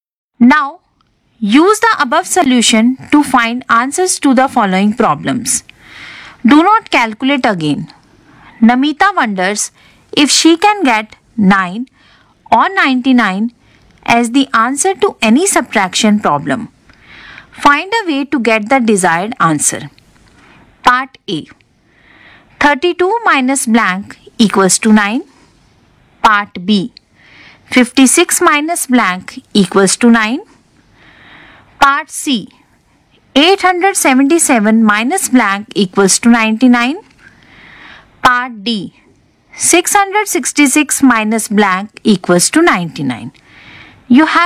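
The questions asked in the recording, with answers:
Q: Part A. 32 minus blank equals to 9.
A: 23

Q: Part B. 56 minus blank equals to 9.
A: 47

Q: Part C. 877 minus blank equals to 99.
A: 778

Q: Part D. 666 minus blank equals to 99.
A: 567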